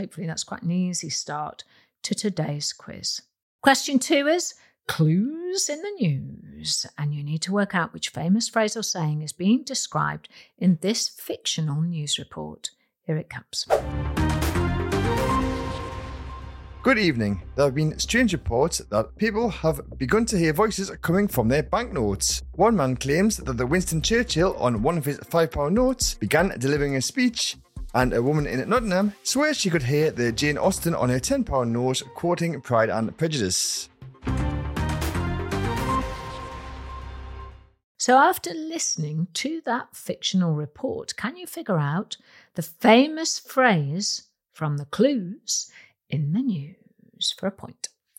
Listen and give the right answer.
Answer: And the famous phrase is money talks.